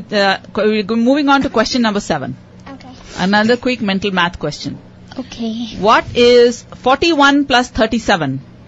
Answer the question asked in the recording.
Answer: 78 is